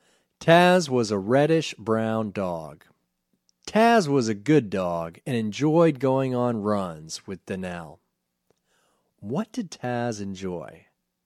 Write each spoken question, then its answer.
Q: What did Taz enjoy?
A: Taz enjoyed going on runs with Danielle.